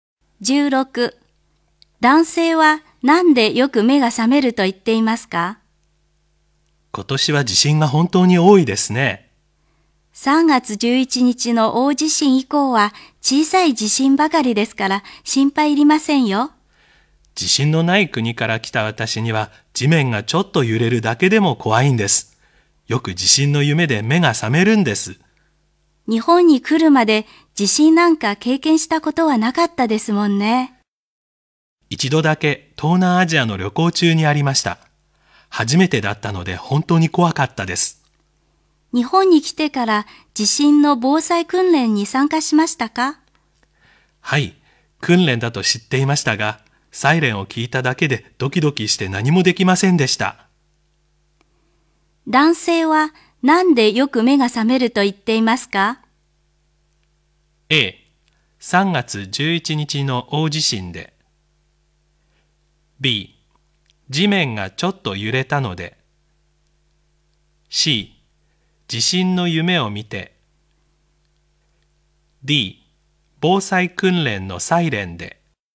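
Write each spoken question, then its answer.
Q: 男性はなんでよく目が覚めると言っていますか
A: C: 地震の夢を見て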